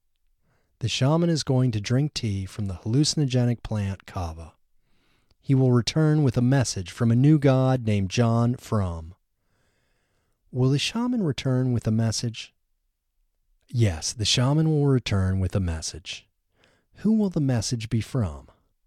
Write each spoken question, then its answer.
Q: Who will the message be from?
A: The message will be from a new god named John Frum.